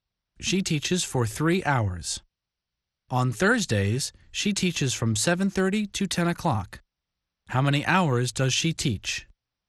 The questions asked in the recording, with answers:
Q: How many hours does she teach?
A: She teaches for 2.5 hours.